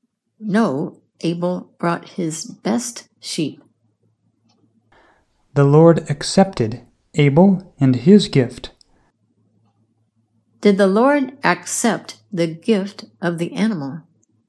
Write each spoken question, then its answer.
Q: Did the Lord accept the gift of the animal?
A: Yes, the Lord accepted the gift of the sheep.